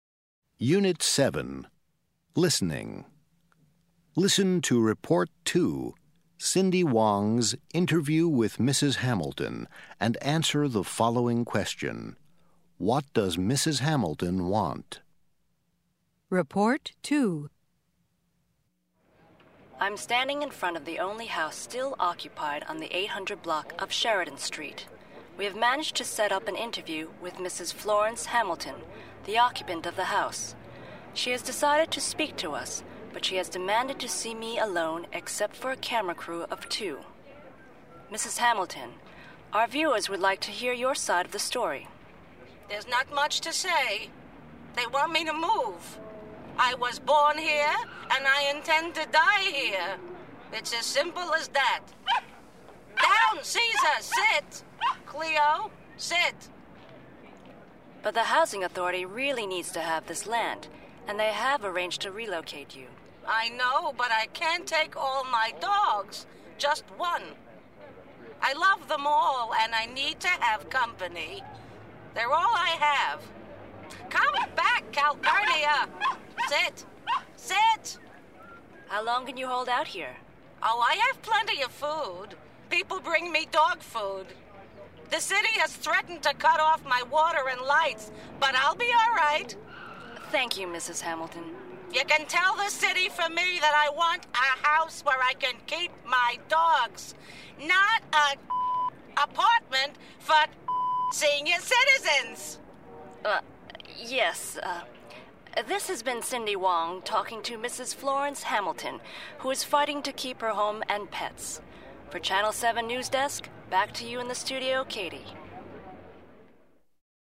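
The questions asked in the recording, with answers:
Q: What does Mrs. Hamilton want?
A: A house where she can keep her dogs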